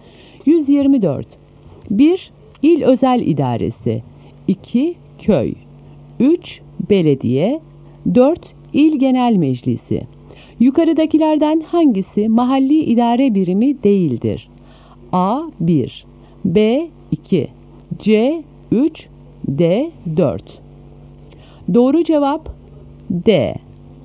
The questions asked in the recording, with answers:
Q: Yukarıdakilerden hangisi mahalli idare birimi değildir?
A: Doğru cevap D.